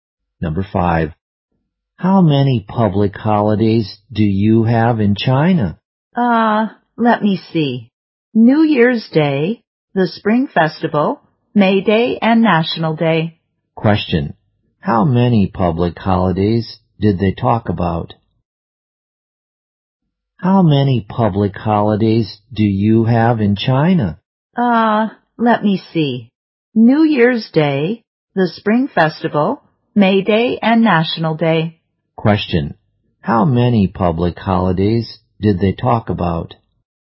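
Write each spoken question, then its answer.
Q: How many public holidays did they talk about?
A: Four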